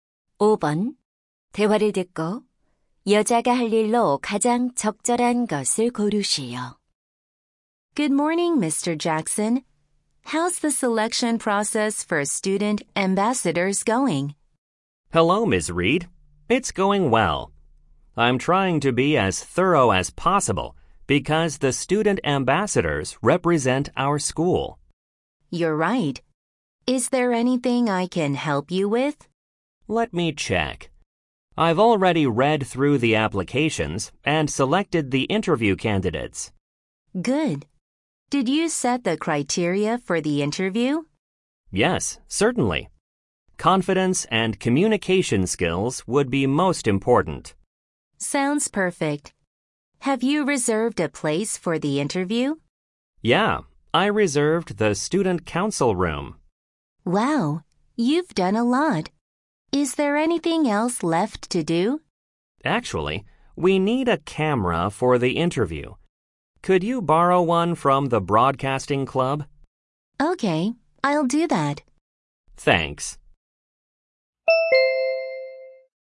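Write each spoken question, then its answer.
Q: 대화를 듣고 여자가 할 일로 가장 적절한 것을 고르시오.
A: 방송부에서 카메라 빌려오기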